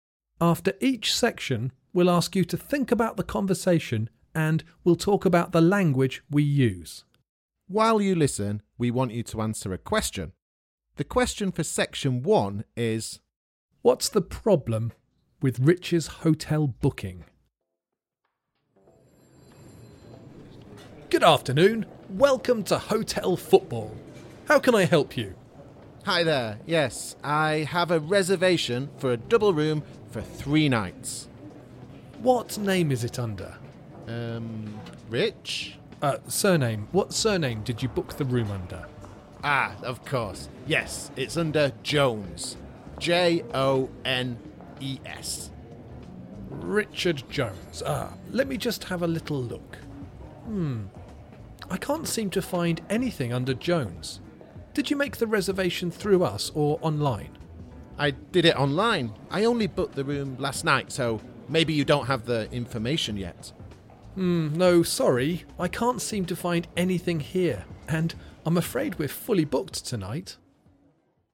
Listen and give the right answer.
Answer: The problem is that you don't have a reservation.